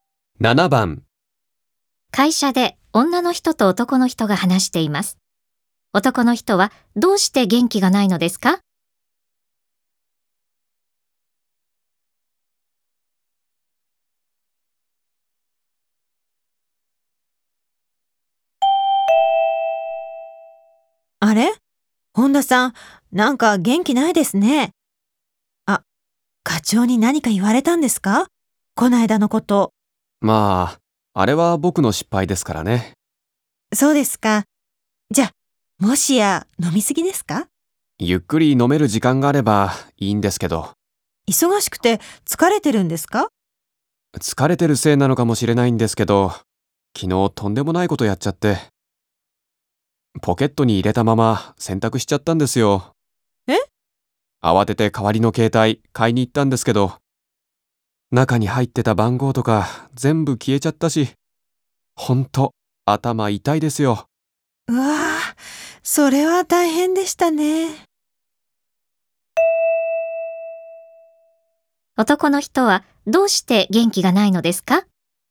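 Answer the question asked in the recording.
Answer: 携帯電話をポケットに入れたまま洗濯してしまい、番号が全部消えたから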